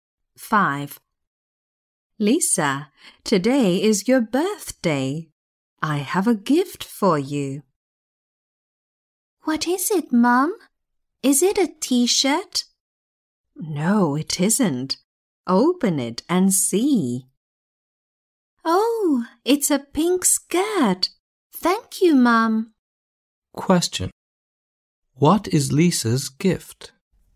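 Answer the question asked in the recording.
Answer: a pink skirt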